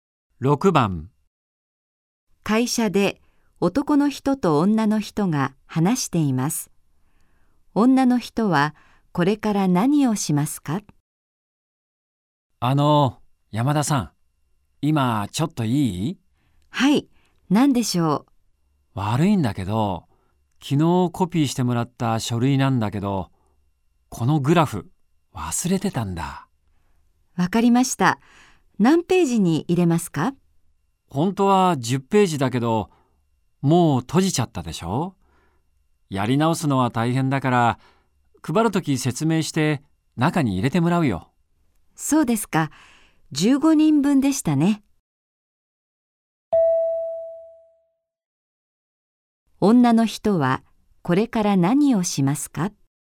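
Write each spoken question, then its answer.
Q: 女の人はこれから何をしますか?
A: グラフを15人分コピーする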